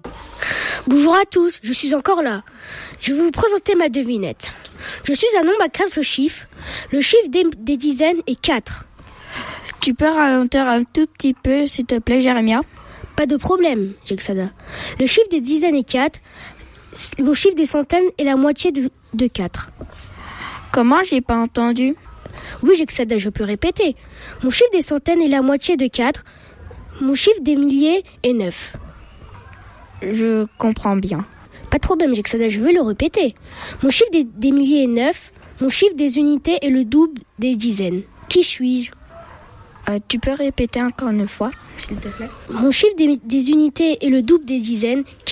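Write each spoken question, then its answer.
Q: Qui suis-je ?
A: 9248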